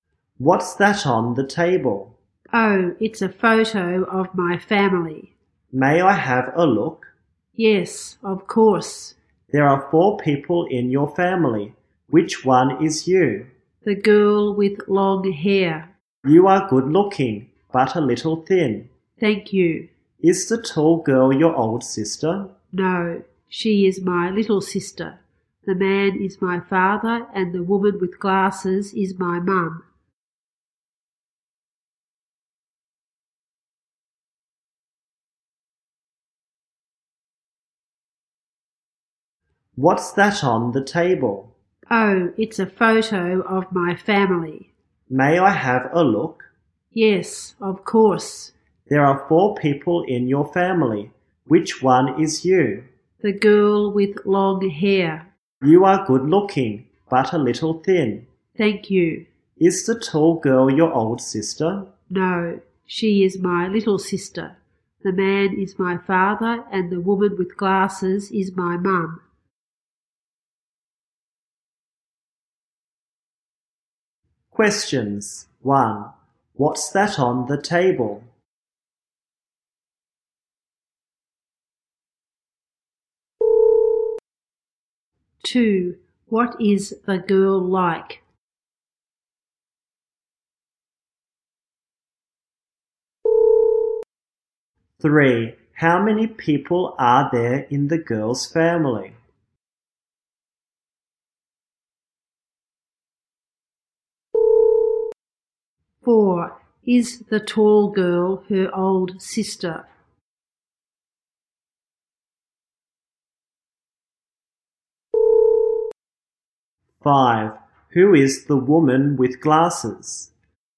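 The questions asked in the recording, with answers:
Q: What's that on the table?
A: A photo of the girl's family

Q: What is the girl like?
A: Good looking but a little thin, with long hair

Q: How many people are there in the girl's family?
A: Four

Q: Is the tall girl her old sister?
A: No, she is her little sister

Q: Who is the woman with glasses?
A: Her mum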